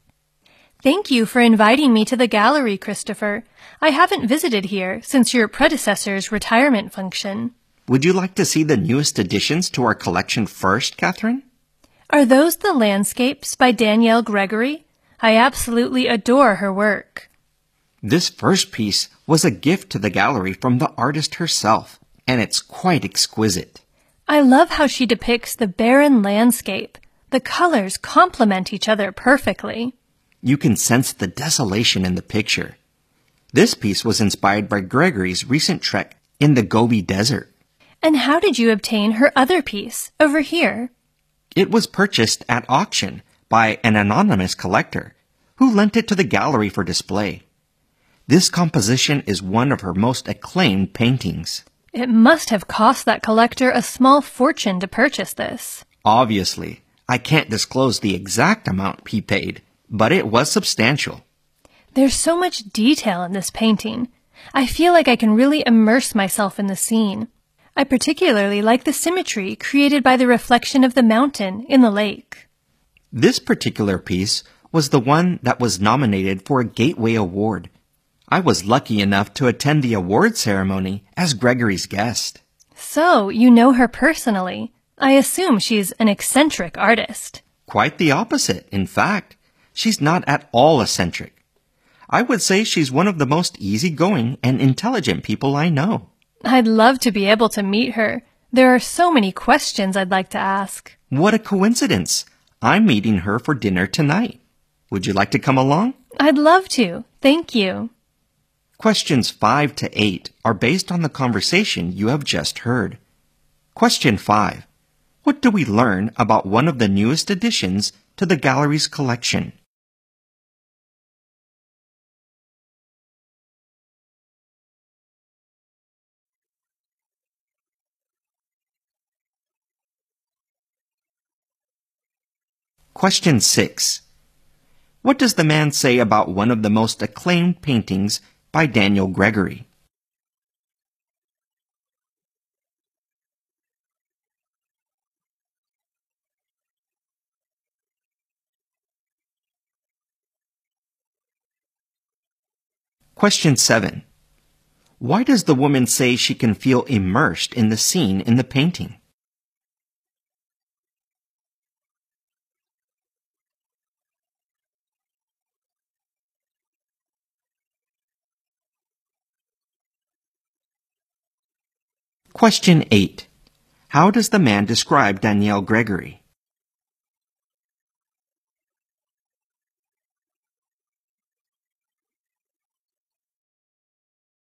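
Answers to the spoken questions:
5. It was a gift from the artist herself, inspired by her trek in the Gobi Desert
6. An anonymous collector bought it at auction for a large sum and lent it to the gallery
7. There is so much detail in the painting
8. Easygoing and intelligent, not eccentric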